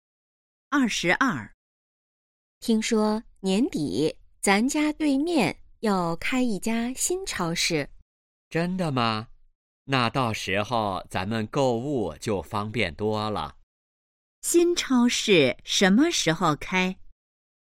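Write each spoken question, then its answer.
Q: 新超市什么时候开?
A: 年底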